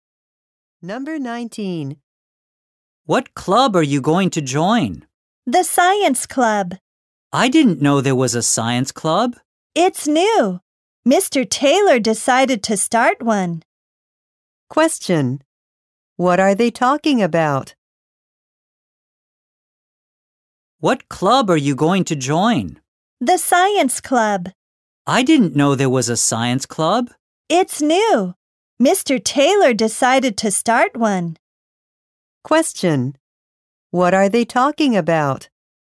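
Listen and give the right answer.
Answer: A new science club.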